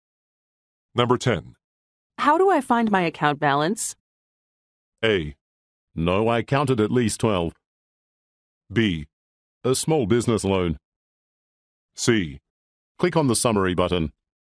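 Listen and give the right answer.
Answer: C: Click on the summary button.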